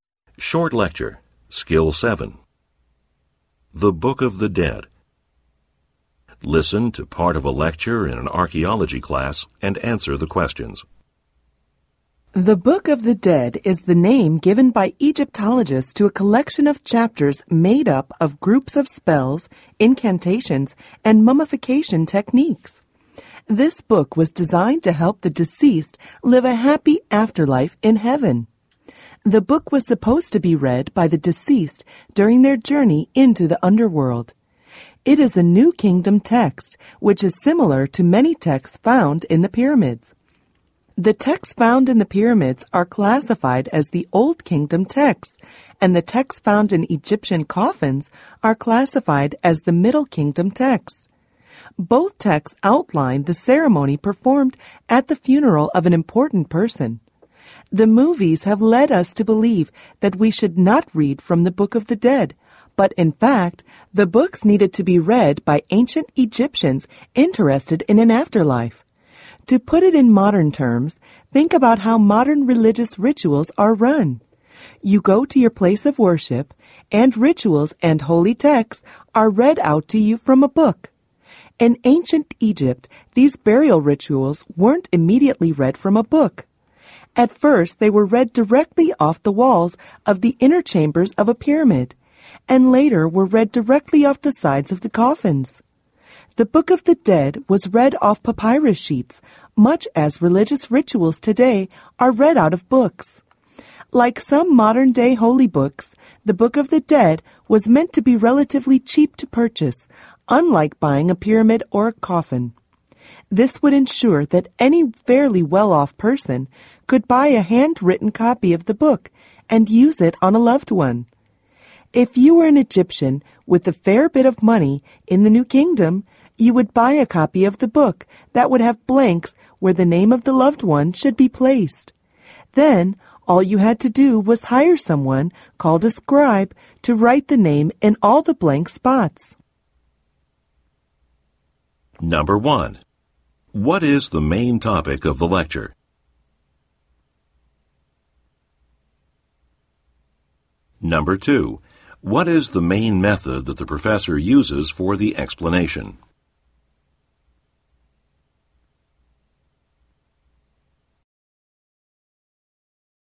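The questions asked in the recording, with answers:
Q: What is the main topic of the lecture?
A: The Egyptian Book of the Dead and how it was used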